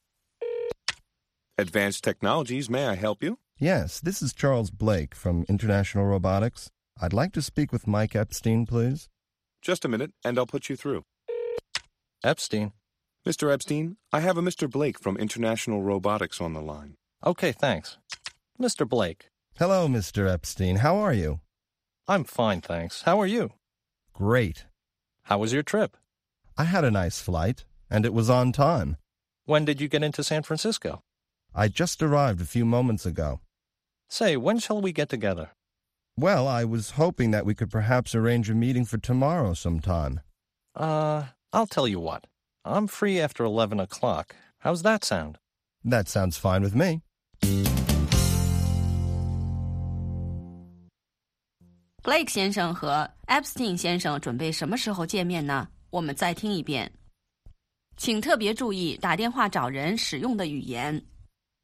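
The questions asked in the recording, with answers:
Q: Blake 先生和 Epstein 先生准备什么时候见面呢?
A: 明天11点以后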